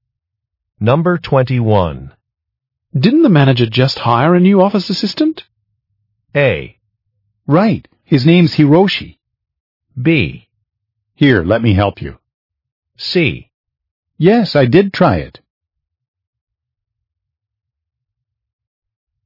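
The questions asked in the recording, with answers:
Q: Didn't the manager just hire a new office assistant?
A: A: Right. His name's Hiroshi.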